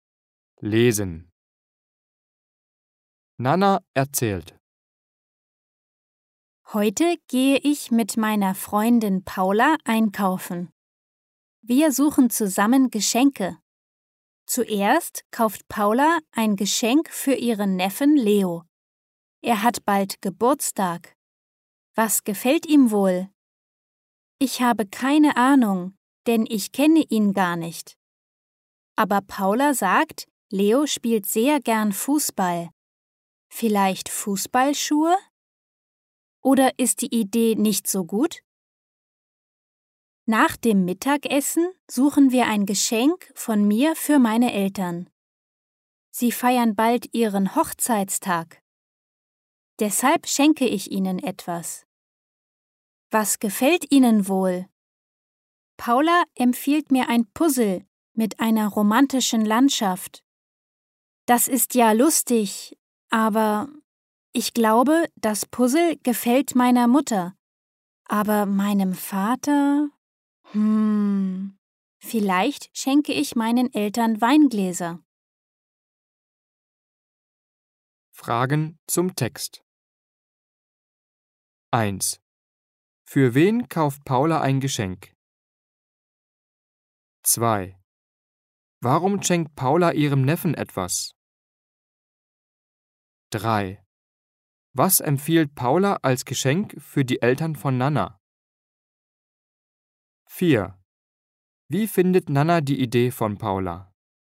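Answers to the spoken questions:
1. Für ihren Neffen Leo
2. Er hat bald Geburtstag
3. Ein Puzzle mit einer romantischen Landschaft
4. Lustig, aber das Puzzle gefällt wohl nur ihrer Mutter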